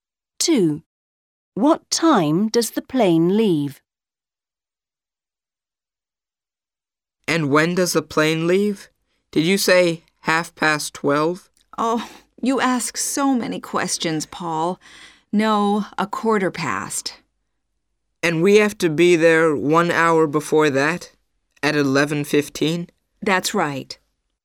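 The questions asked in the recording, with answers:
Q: What time does the plane leave?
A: 12:15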